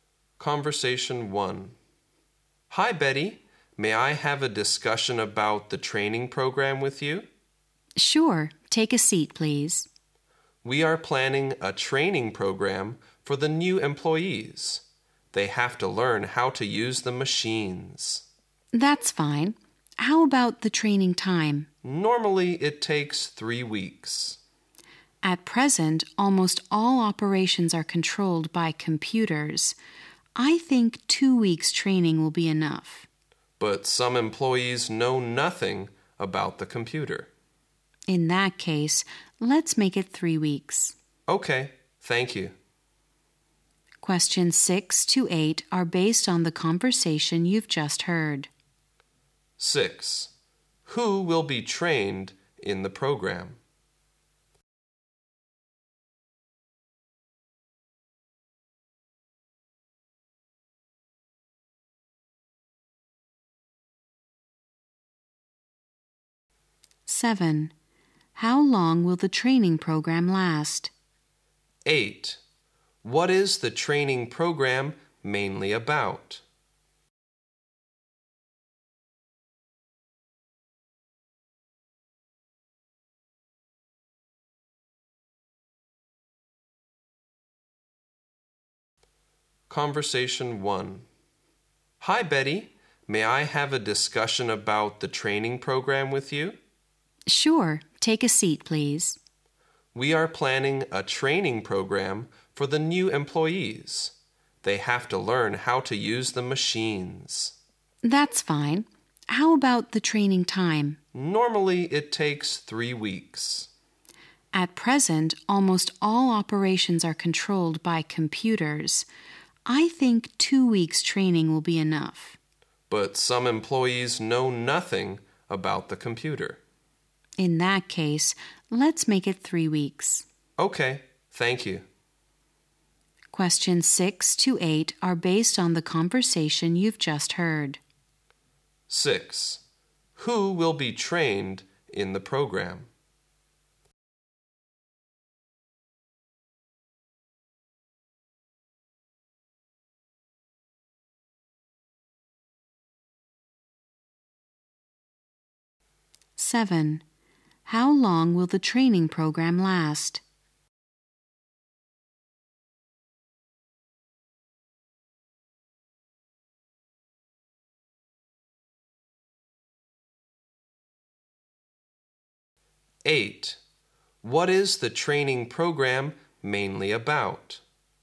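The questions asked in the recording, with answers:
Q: Who will be trained in the program?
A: The new employees

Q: How long will the training program last?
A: Three weeks

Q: What is the training program mainly about?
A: How to use the machines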